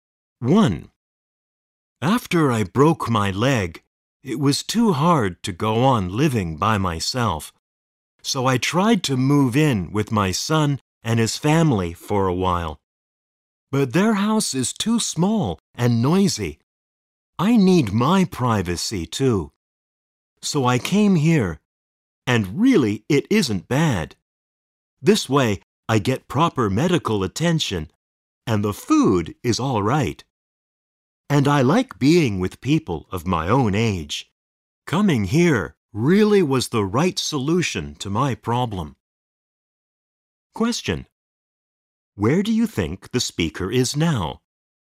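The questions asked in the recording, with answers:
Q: Question. Where do you think the speaker is now?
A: In a retirement home (nursing home for elderly people)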